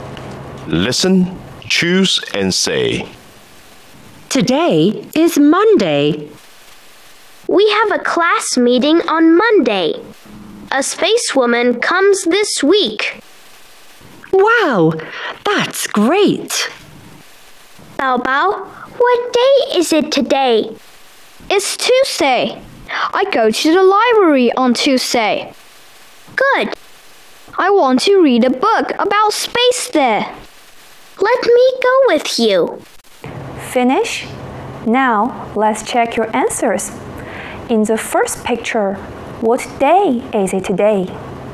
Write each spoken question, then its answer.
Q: In the first picture, what day is it today?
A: Today is Monday.